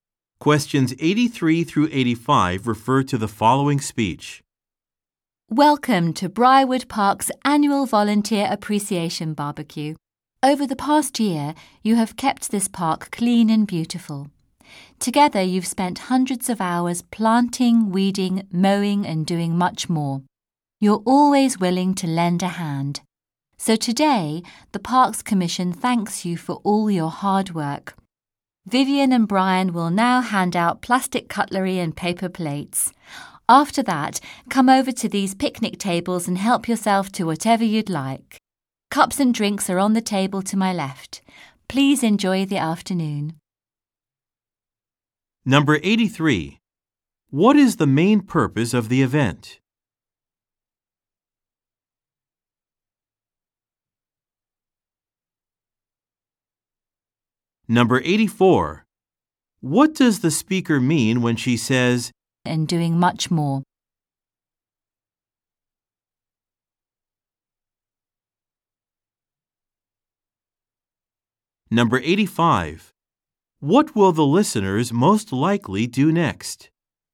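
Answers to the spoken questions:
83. To thank park volunteers for their work
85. Get plastic cutlery and paper plates, then food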